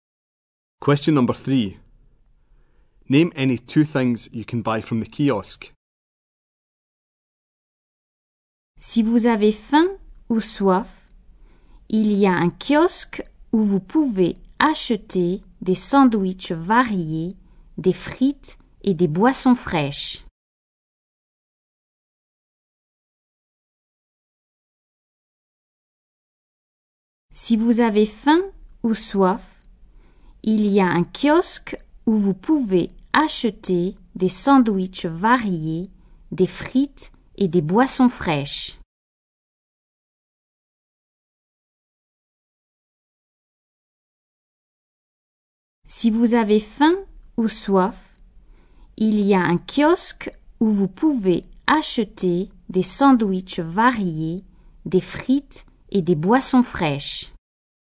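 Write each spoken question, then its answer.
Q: Name any two things you can buy from the kiosk.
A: Sandwiches, chips, cold drinks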